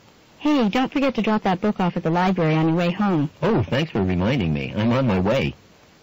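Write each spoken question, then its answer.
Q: What will the man probably do next?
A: Go to the library to return the book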